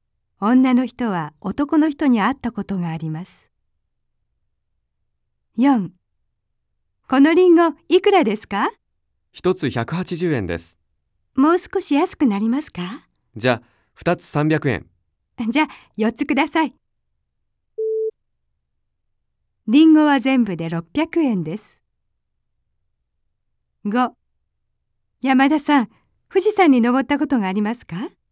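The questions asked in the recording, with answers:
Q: リンゴは全部で600円です。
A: ○(正しい)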